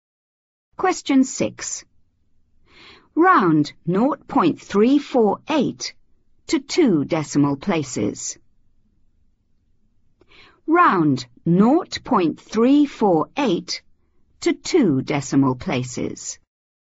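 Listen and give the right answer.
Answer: 0.35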